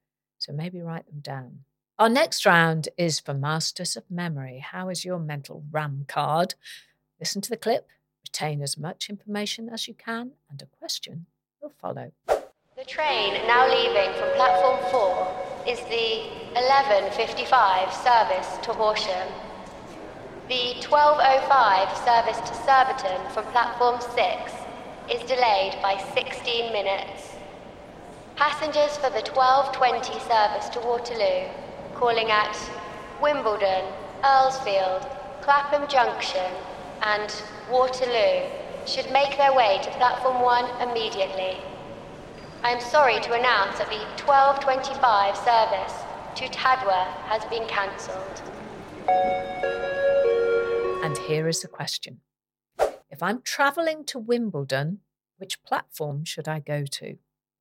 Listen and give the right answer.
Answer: The answer was platform 1.